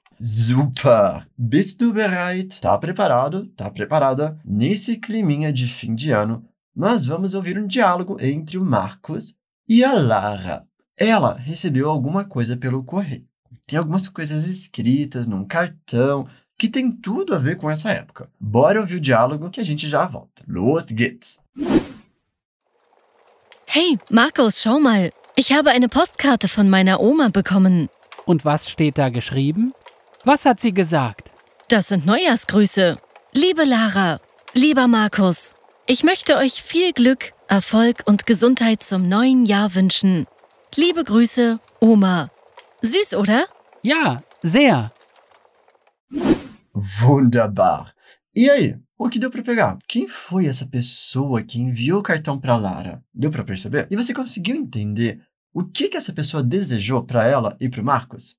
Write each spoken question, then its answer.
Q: Quem foi essa pessoa que enviou o cartão para Lara?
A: eu recebi um cartão postal da minha avó

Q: E você conseguiu entender o que, que essa pessoa desejou para ela e para Marcos?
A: eu gostaria de desejar a vocês muita sorte sucesso e saúde para o ano novo